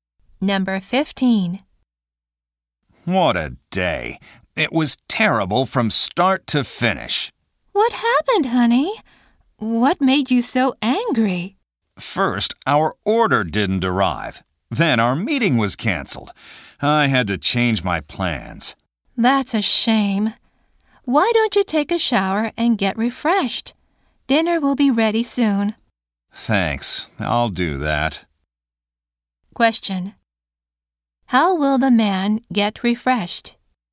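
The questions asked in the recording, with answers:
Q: How will the man get refreshed?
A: By taking a shower.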